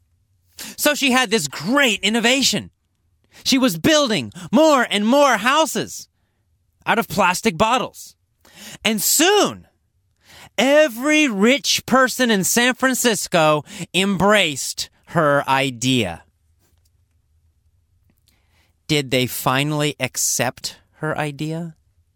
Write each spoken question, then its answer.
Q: Did they finally accept her idea?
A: Yes, they did. They finally embraced her idea.